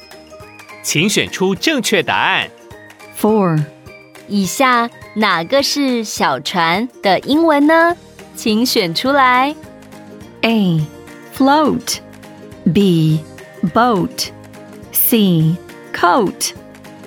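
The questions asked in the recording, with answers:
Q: 以下哪个是小船的英文呢?请选出来。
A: B: boat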